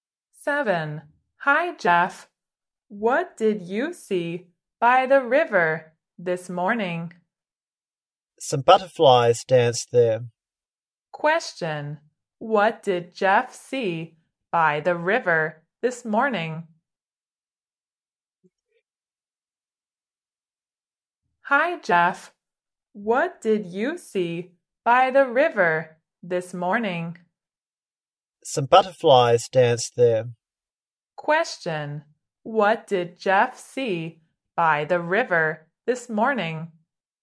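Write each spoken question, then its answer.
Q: what did Jeff see by the river this morning?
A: Some butterflies.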